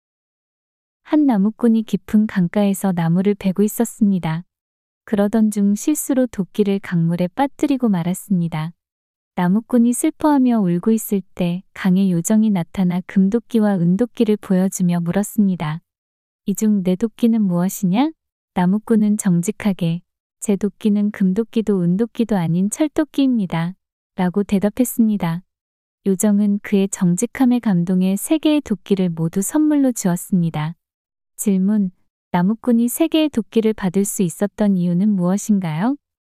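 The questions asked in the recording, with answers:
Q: 나무꾼이 세 개의 도끼를 받을 수 있었던 이유는 무엇인가요?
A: 정직하게 대답해서 요정이 그의 정직함에 감동했기 때문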